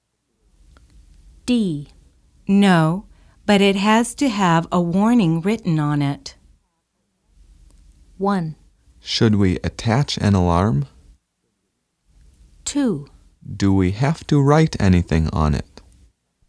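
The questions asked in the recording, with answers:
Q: No, but it has to have a warning written on it.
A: 1: Should we attach an alarm?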